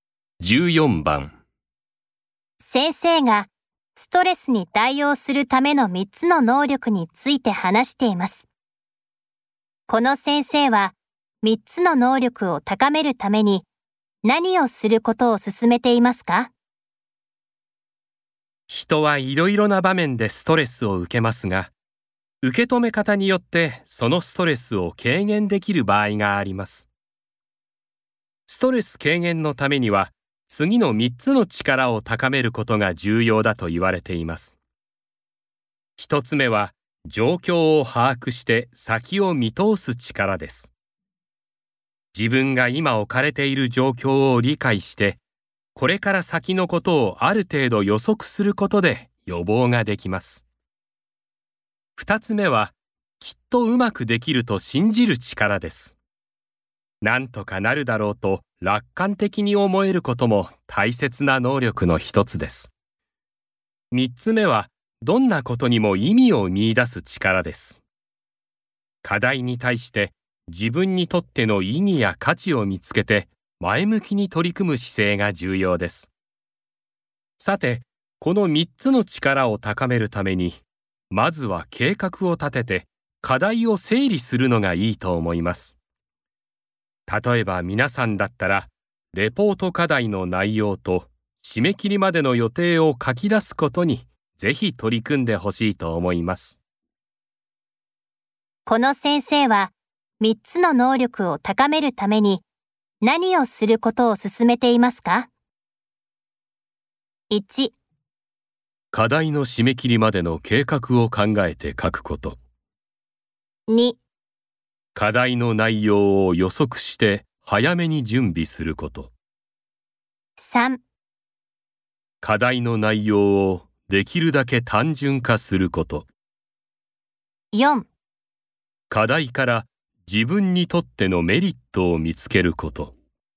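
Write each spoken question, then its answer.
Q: この先生は3つの能力を高めるために何をすることを進めていますか?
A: 1: 課題の締め切りまでの計画を考えて書くこと。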